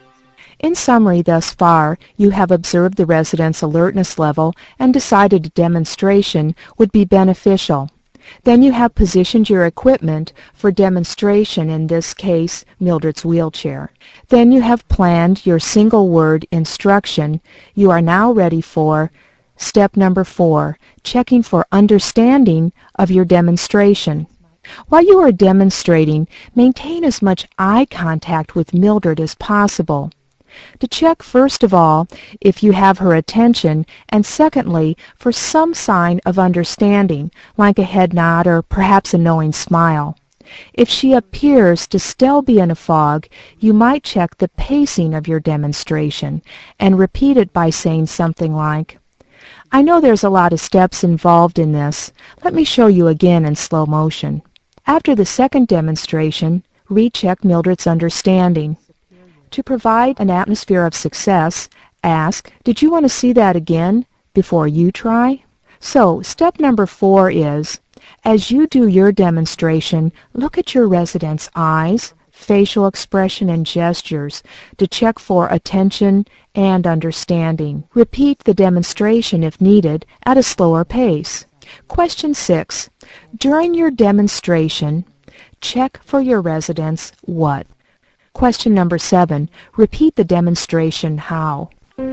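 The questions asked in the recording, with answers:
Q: During your demonstration, check for your resident's what?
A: Attention and understanding

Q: Repeat the demonstration how?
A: At a slower pace, if needed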